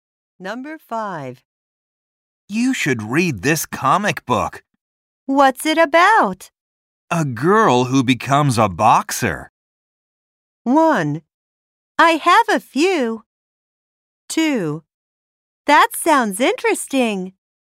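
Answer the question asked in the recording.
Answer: 2: That sounds interesting.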